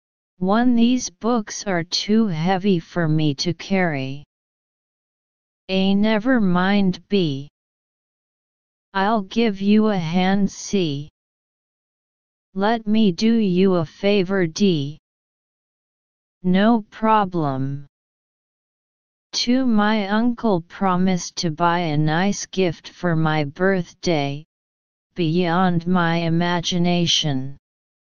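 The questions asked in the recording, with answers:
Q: These books are too heavy for me to carry.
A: B: I'll give you a hand.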